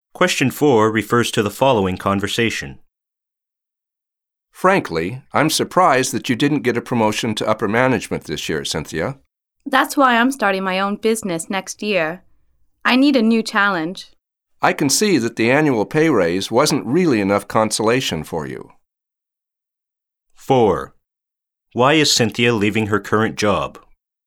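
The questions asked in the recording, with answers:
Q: Why is Cynthia leaving her current job?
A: She wasn't promoted and wants a new challenge, so she is starting her own business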